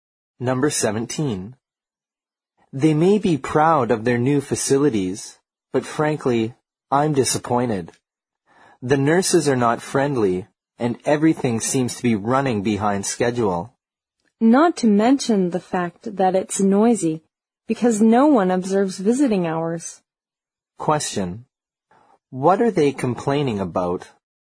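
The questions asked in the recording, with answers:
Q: What are they complaining about?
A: The service at the hospital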